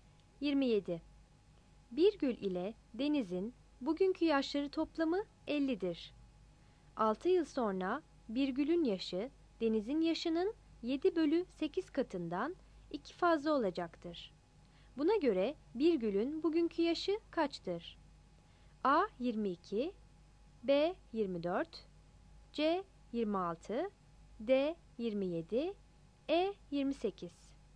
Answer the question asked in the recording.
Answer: 27 B